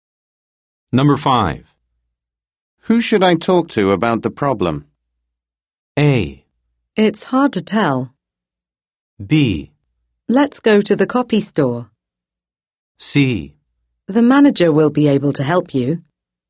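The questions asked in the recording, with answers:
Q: Who should I talk to about the problem?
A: C: The manager will be able to help you.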